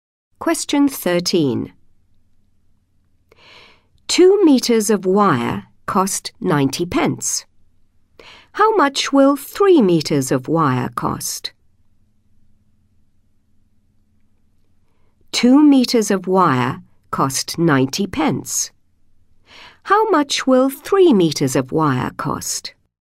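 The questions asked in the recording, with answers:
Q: How much will 3 meters of wire cost?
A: £1.35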